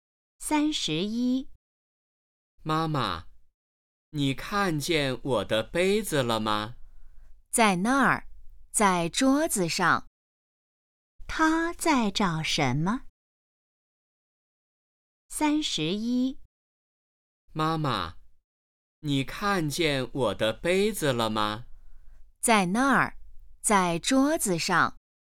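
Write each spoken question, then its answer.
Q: 他在找什么?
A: 杯子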